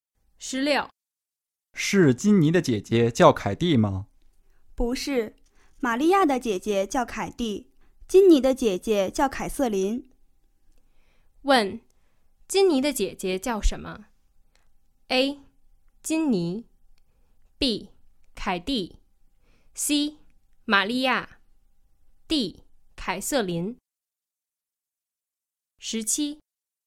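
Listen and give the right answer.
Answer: D: 凯瑟琳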